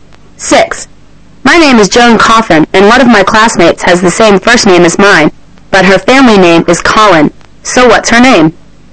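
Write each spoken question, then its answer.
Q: So what's her name?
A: Joan Colin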